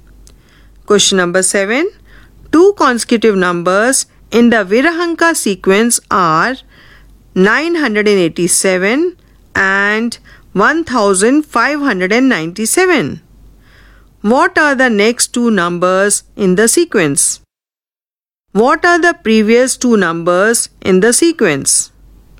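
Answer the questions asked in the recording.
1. 2584 and 4181
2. 610 and 377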